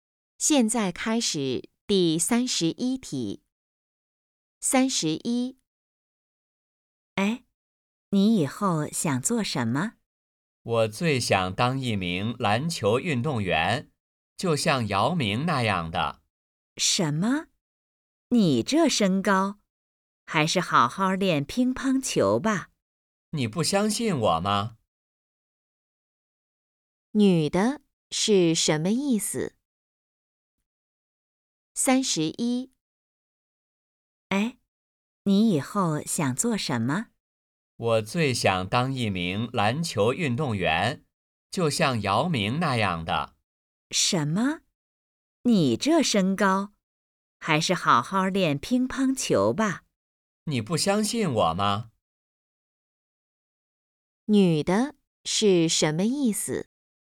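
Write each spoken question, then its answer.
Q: 女的是什么意思?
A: 男的个子不高,不适合打篮球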